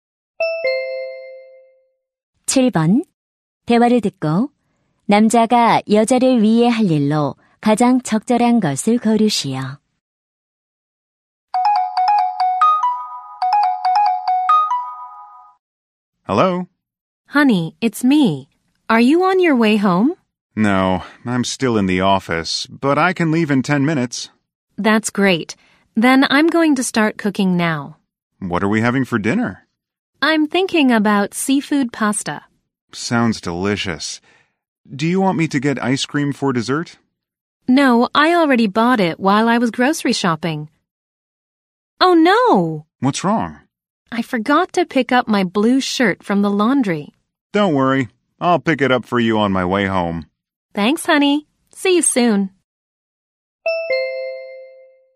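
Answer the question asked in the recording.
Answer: 세탁소에서 셔츠 찾아오기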